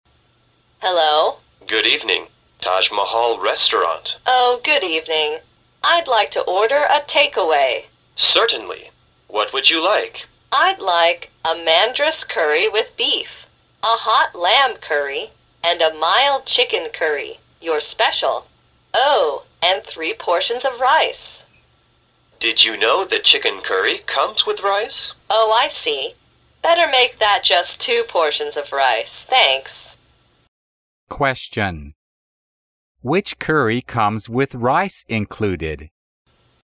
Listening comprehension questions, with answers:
Which curry comes with rice included?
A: Chicken curry.

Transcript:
W: Oh, good evening. I'd like to order a take-away.
M: Certainly, what would you like?
W: I'd like a curry with beef, a hot lamb curry and a mild chicken curry, your special. Oh, and three portions of rice.
M: Did you know that chicken curry comes with rice?
W: Oh, I see. Better make that just two portions of rice. Thanks.
Question: Which curry comes with rice included?